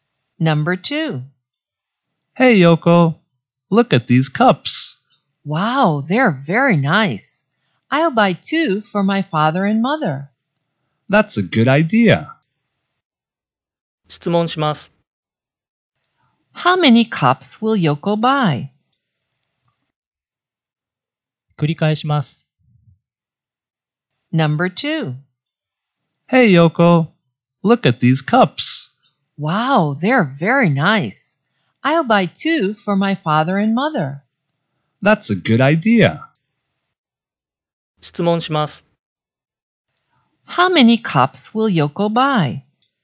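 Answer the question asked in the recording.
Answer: Two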